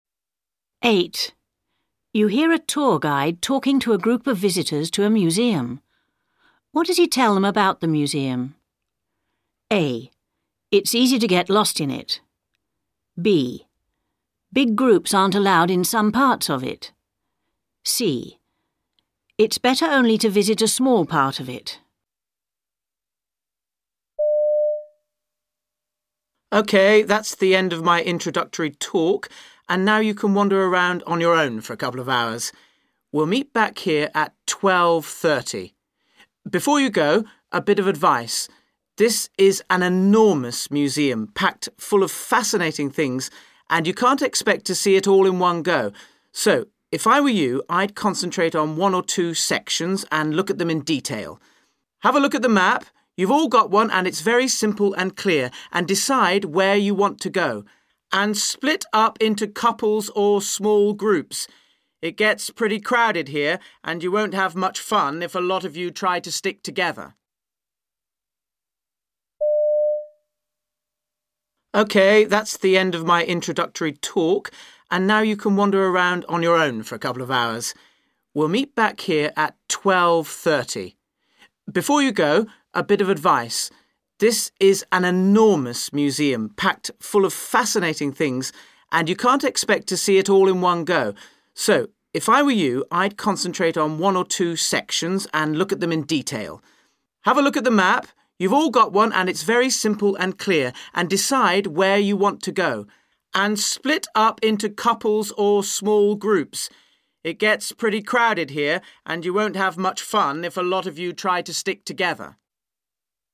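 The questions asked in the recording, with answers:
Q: What does he tell them about the museum?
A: C: It's better only to visit a small part of it.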